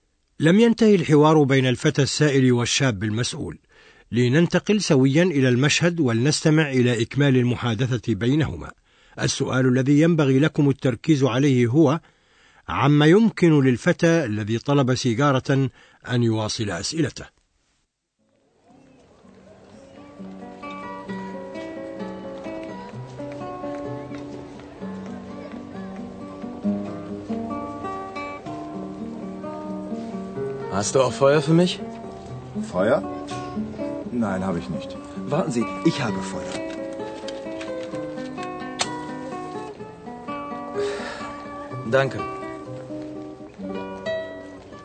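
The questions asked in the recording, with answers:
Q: عما يمكن للفتى الذي طلب سيجارة أن يواصل أسئلته.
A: يطلب نارًا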